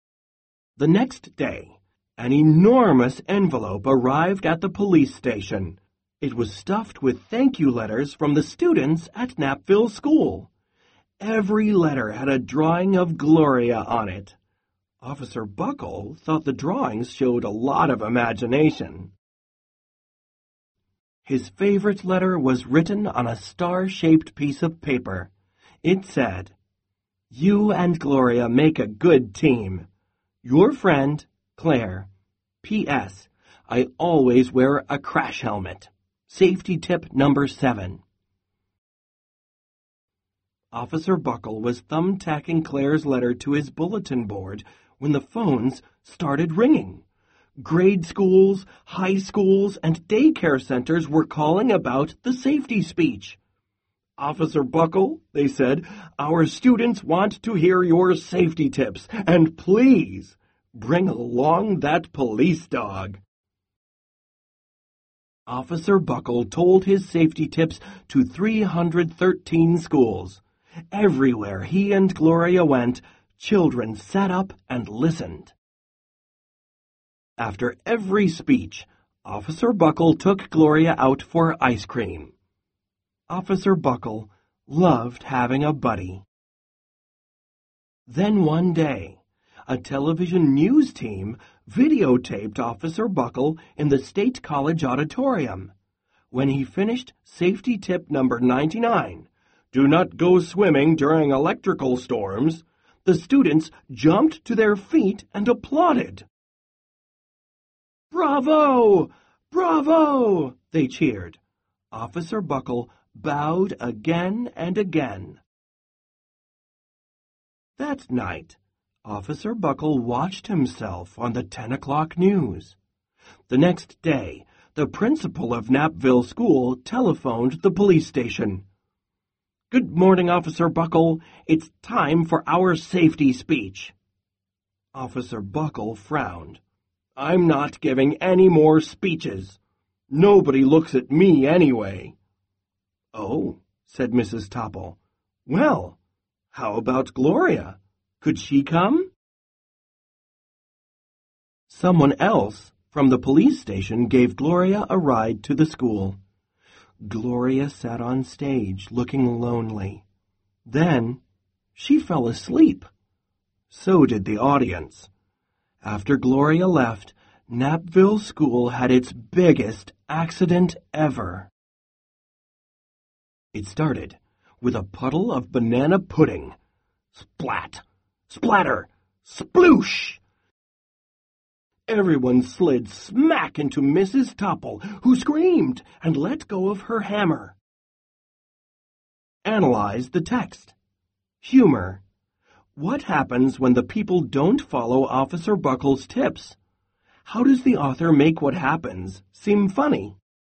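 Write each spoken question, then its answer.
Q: What happens when the people don't follow Officer Buckle's tips?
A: Napville School has its biggest accident ever: everyone slips on banana pudding and slides into Mrs. Topple.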